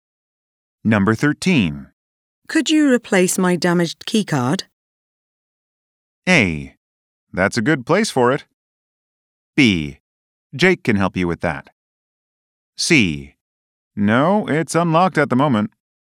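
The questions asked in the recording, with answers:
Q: Could you replace my damaged keycard?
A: B: Jake can help you with that.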